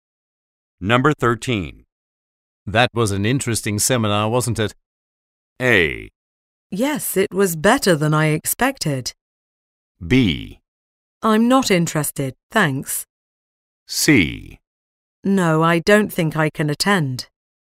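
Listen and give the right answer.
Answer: A: Yes, it was better than I expected.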